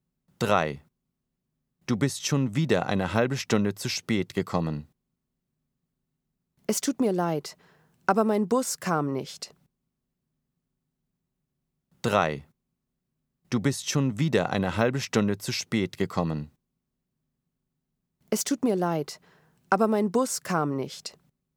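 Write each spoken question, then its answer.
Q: Du bist schon wieder eine halbe Stunde zu spät gekommen. Es tut mir leid, aber mein Bus kam nicht.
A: L: logisch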